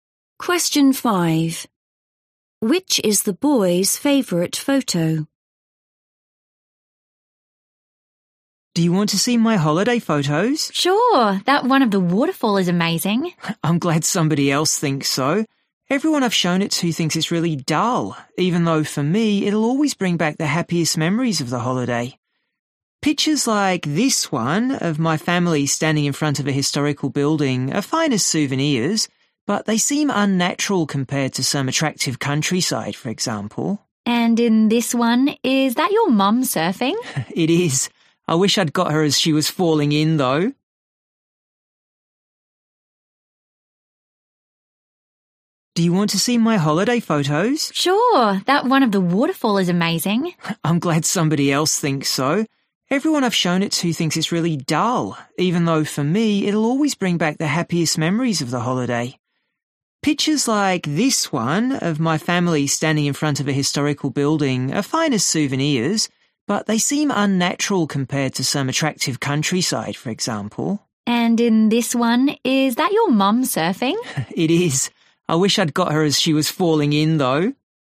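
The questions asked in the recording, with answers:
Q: Which is the boy's favorite photo?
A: the waterfall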